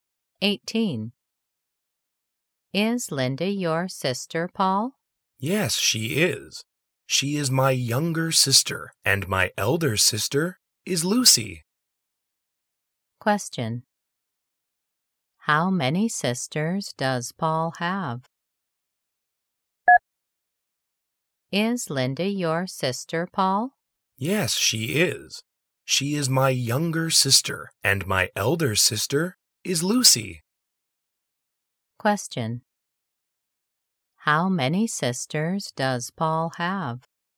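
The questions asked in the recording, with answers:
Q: How many sisters does Paul have?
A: two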